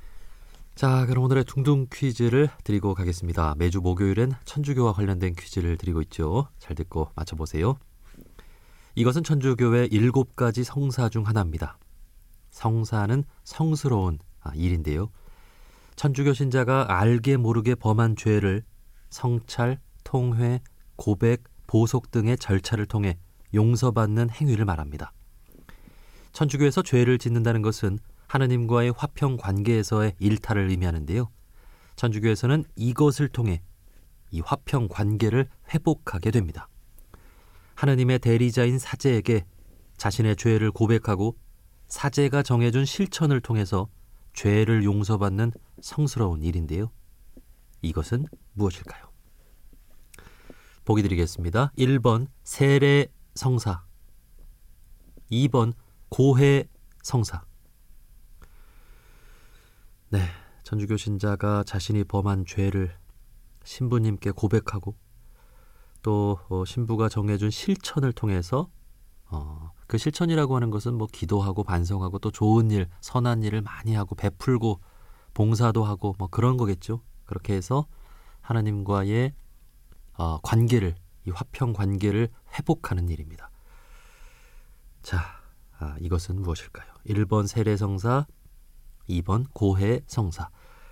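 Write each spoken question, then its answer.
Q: 자, 이것은 무엇일까요? 1번 세례성사, 2번 고해성사.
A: 2번: 고해 성사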